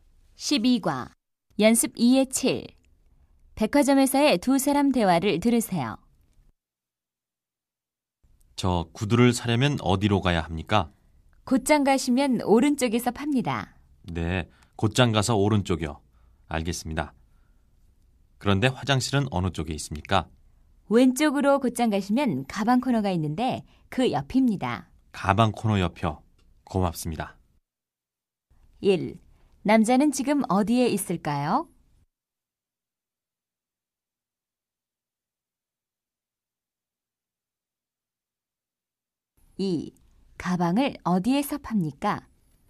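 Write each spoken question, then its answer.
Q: 남자는 지금 어디에 있을까요?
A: 백화점

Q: 가방을 어디에서 팝니까?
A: 왼쪽으로 곧장 가면 있는 가방 코너 (화장실 옆)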